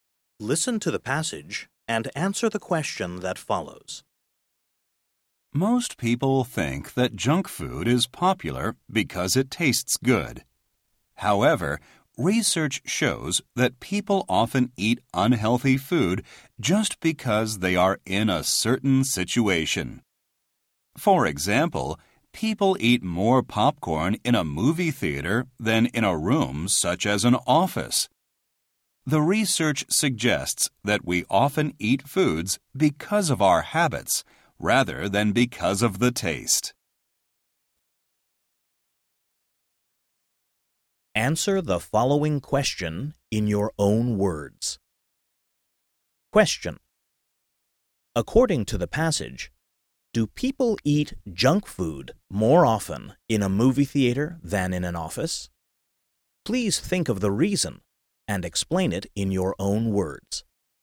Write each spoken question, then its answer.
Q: According to the passage, do people eat junk food more often in a movie theater than in an office?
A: Yes, they do.